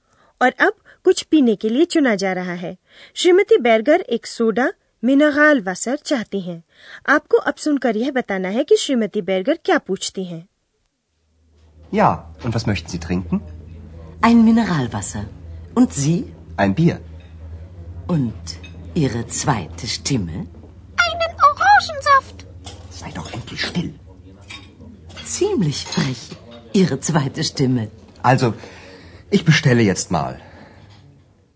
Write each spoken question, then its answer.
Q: आपको अब सुनकर यह बताना है कि श्रीमती बेर्गर क्या पूछती हैं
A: श्रीमती बैरगर मौके का फायदा उठाते हुए हल्का सा व्यंग करते हुए पूछती हैं कि आवाज स्टिमे यानी x क्या पिएगी और आपकी दूसरी आवाज